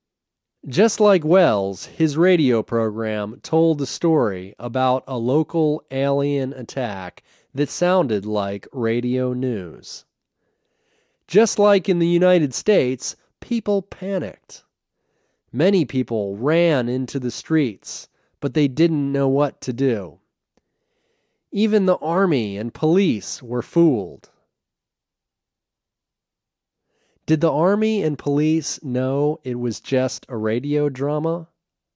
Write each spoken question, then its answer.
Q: Did the army and police know it was just a radio drama?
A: No, the army and police didn't know it was just a radio program.